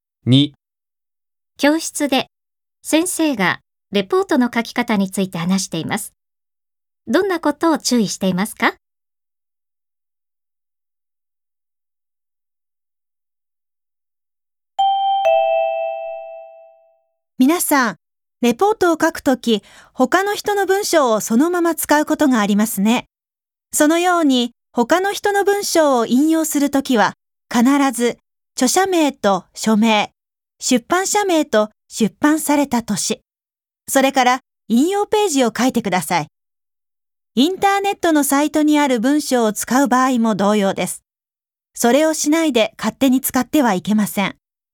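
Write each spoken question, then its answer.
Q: どんなことを注意していますか?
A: 他の人の文章を引用するときは、必ず著者名、書名、出版社名、出版年、引用ページを書くこと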